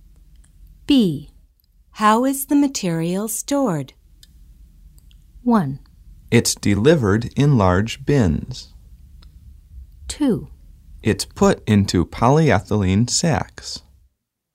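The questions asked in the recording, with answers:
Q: How is the material stored?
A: 2: It's put into polyethylene sacks.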